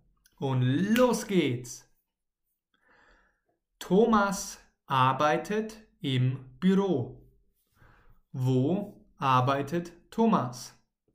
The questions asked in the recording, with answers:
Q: Wo arbeitet Thomas?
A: Im Büro. Thomas arbeitet im Büro.